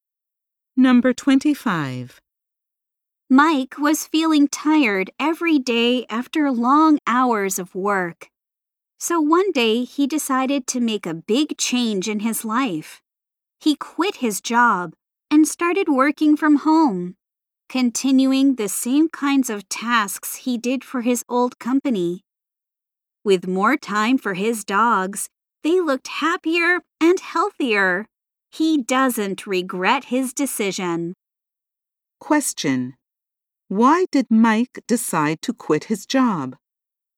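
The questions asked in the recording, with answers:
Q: Why did Mike decide to quit his job?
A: He was tired every day after long hours of work.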